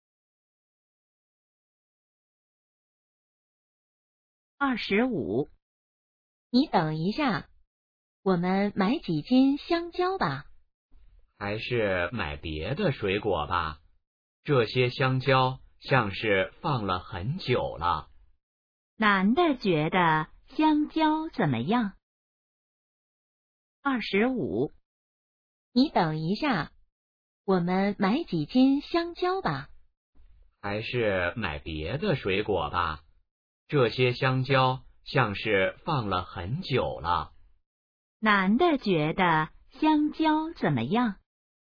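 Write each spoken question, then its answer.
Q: 男的觉得香蕉怎么样?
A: 放了很久了,不新鲜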